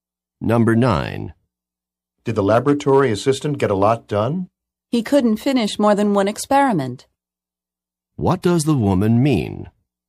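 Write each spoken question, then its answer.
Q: What does the woman mean?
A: The assistant finished only one experiment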